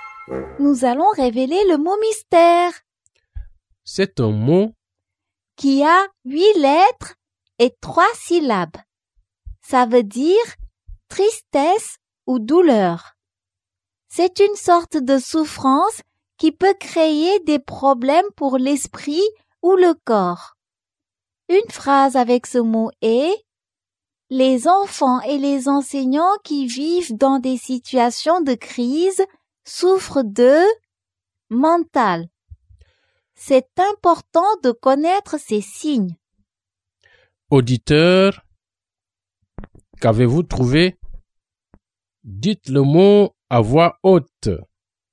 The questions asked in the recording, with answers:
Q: Auditeur, qu'avez-vous trouvé?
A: Le mot mystère est détresse.